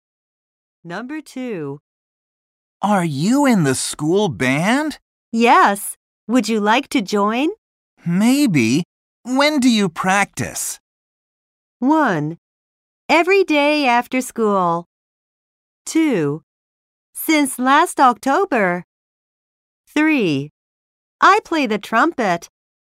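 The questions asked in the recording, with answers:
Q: Maybe. When do you practice?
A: 1: Every day after school.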